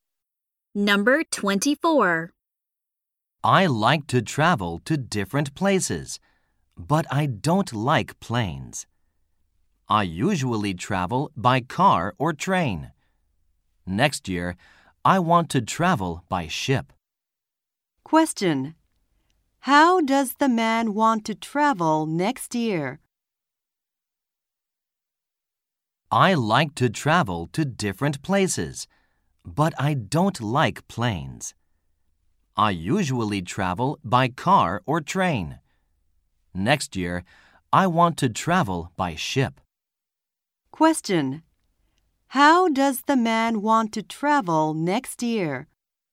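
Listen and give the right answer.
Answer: By ship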